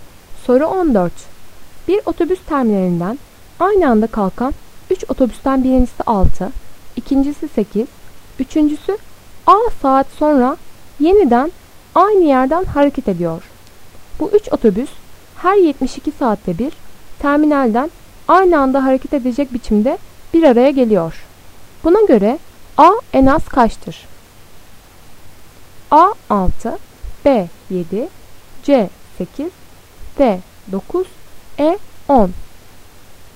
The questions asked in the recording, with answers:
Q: Buna göre A en az kaçtır?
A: Doğru cevap D 9.